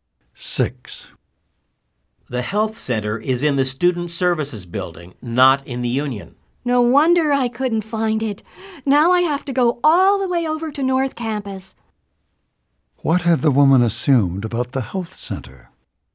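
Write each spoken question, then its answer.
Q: What had the woman assumed about the health center?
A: That it was in the union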